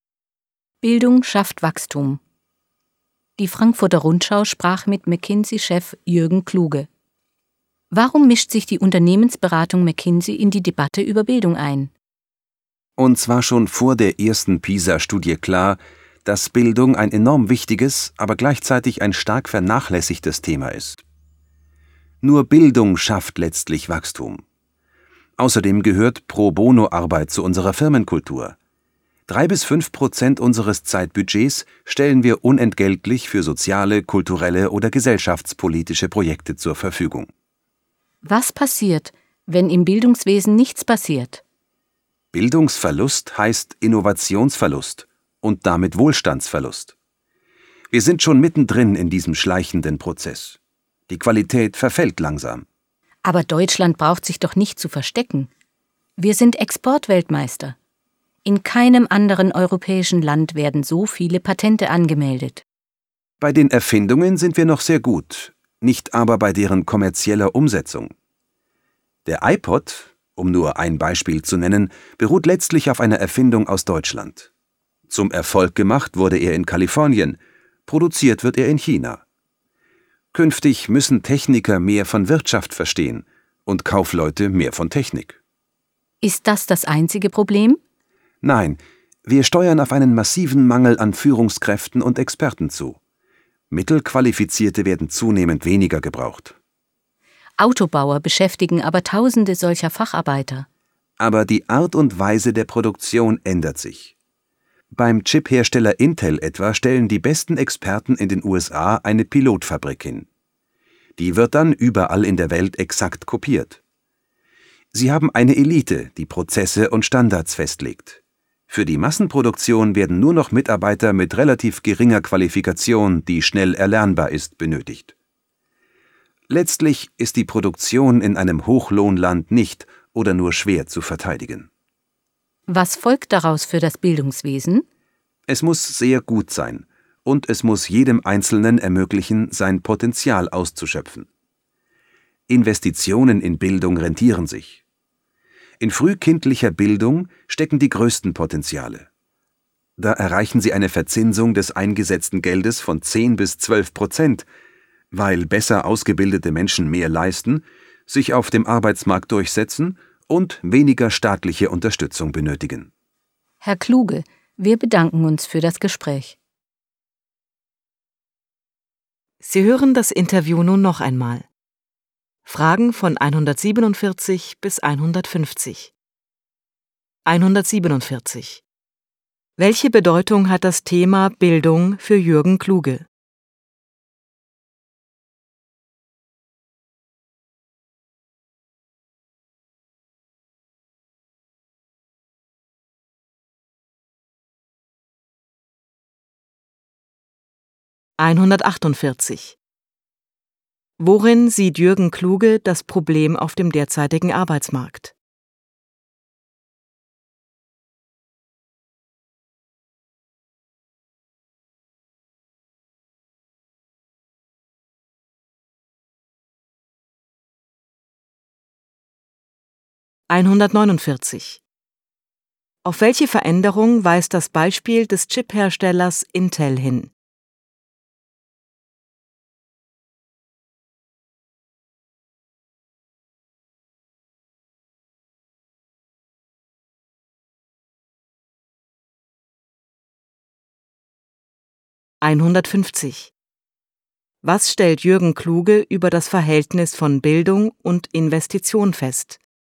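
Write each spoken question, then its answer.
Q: Welche Bedeutung hat das Thema Bildung für Jürgen Kluge?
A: Bildung ist enorm wichtig, aber vernachlässigt; nur Bildung schafft Wachstum

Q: Worin sieht Jürgen Kluge das Problem auf dem derzeitigen Arbeitsmarkt?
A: Massiver Mangel an Führungskräften und Experten

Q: Auf welche Veränderung weist das Beispiel des Chipherstellers Intel hin?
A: Eine Elite legt Standards fest, Massenproduktion braucht nur gering Qualifizierte

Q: Was stellt Jürgen Kluge über das Verhältnis von Bildung und Investition fest?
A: Investitionen in Bildung rentieren sich, besonders frühkindliche (10-12%)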